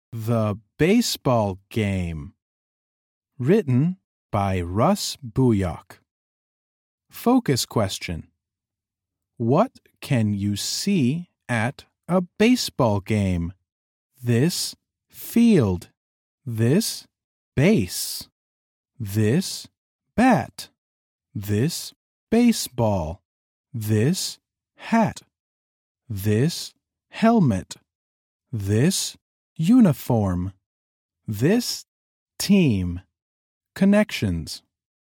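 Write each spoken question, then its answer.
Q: What can you see at a baseball game?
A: A field, bases, a bat, a baseball, a hat, a helmet, uniforms and a team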